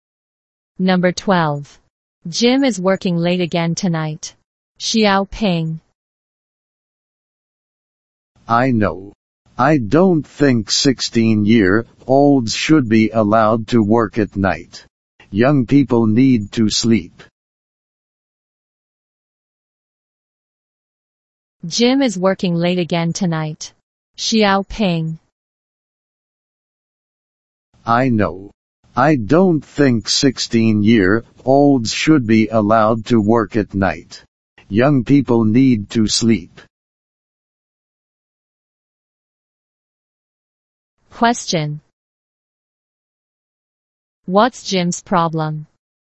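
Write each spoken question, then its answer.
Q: What's Jim's problem?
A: He works late at night again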